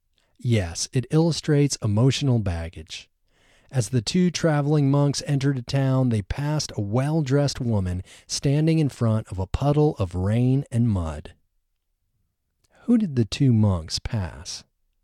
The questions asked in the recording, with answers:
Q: Who did the two monks pass?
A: The two monks passed a well-dressed woman.